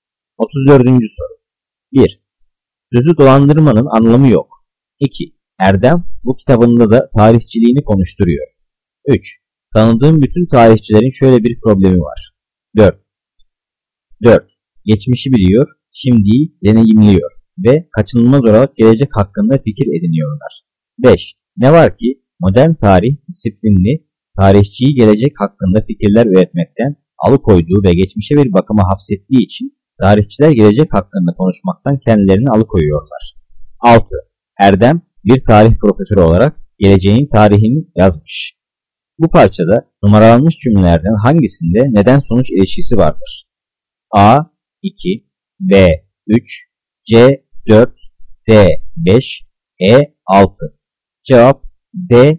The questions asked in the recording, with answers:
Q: Bu parçada numaralanmış cümlelerden hangisinde neden sonuç ilişkisi vardır?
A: Cevap D.